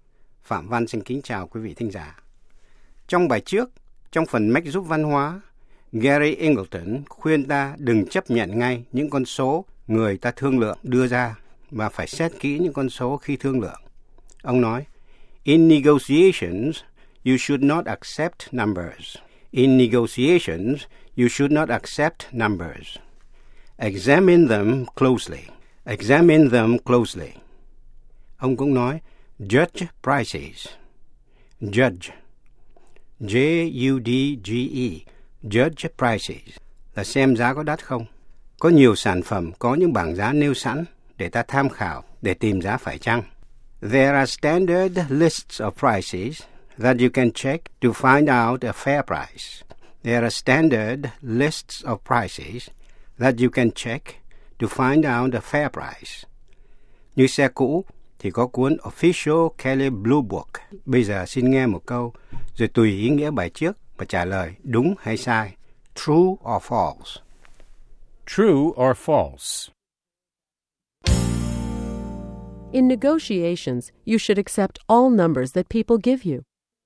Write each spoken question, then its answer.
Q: In negotiations, you should accept all numbers that people give you.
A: False. It's important to ask where the numbers come from.